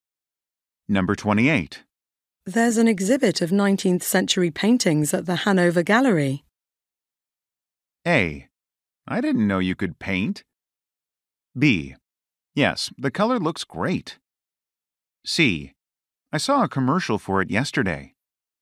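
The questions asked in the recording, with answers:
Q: There's an exhibit of 19th century paintings at the Hanover Gallery.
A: C: I saw a commercial for it yesterday.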